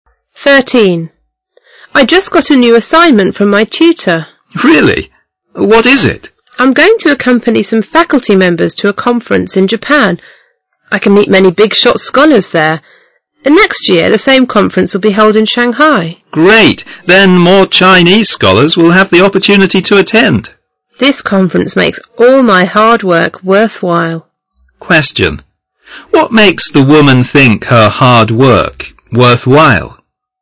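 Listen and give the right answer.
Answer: Going to a conference in Japan where she can meet many big-shot scholars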